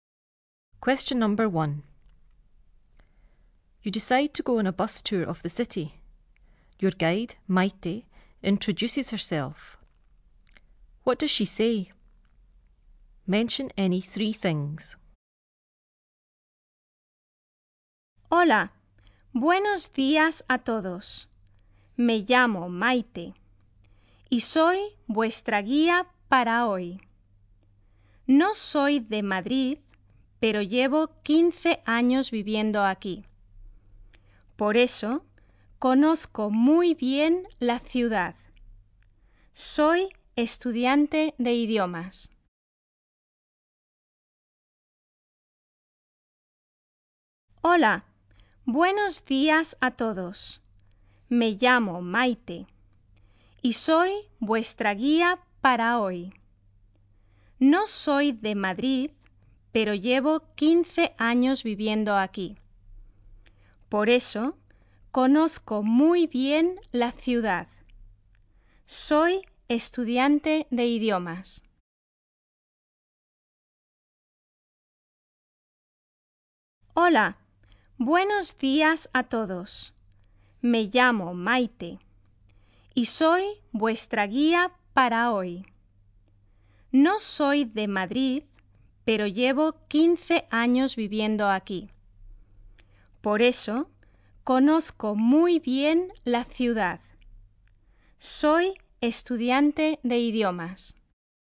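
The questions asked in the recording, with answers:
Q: What does she say? Mention any 3 things.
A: Her name is Maite; she is the guide for today; she is not from Madrid but has lived there 15 years; she knows the city well; she studies languages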